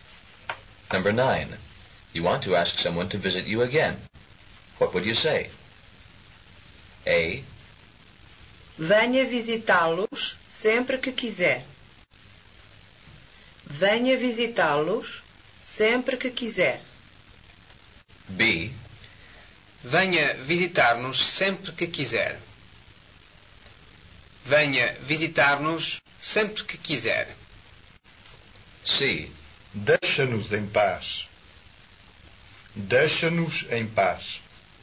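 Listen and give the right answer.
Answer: B: Venha visitar-nos sempre que quiser.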